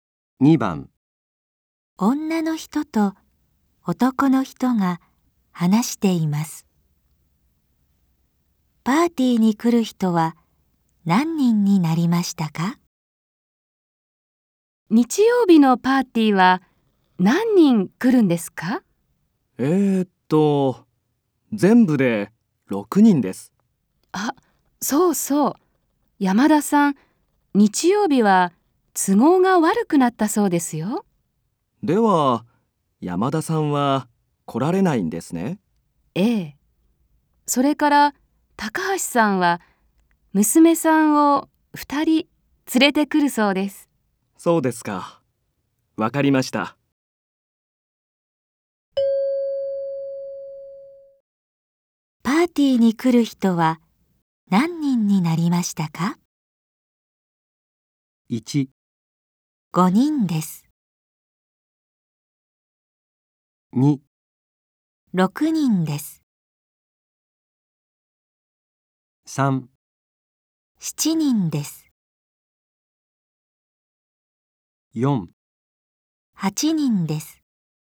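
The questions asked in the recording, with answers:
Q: パーティーに来る人は何人になりましたか?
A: 3: 7人です。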